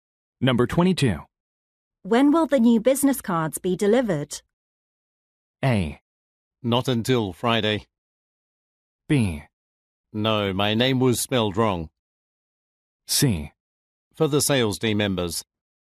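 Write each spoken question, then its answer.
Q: When will the new business cards be delivered?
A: A: Not until Friday.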